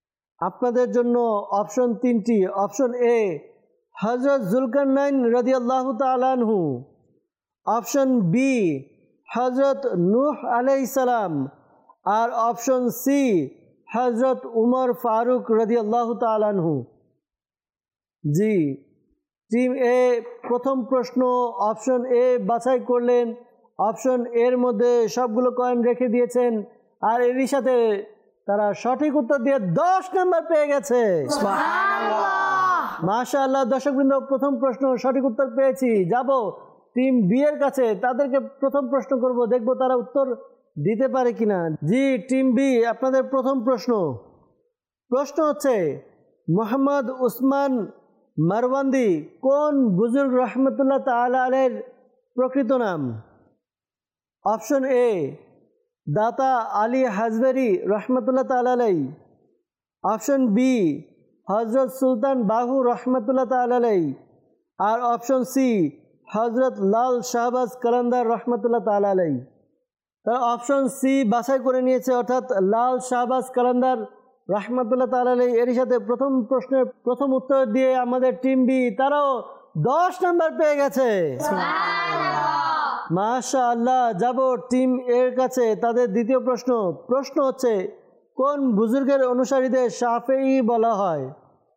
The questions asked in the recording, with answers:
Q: মোহাম্মদ উসমান মারওয়ান্দি কোন বুজুর্গ রহমতুল্লাহ তাআলা এর প্রকৃত নাম?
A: তারা option সি বাছাই করে নিয়েছে, অর্থাৎ লাল শাহবাজ কলন্দর রহমতুল্লাহ তাআলা আলাই।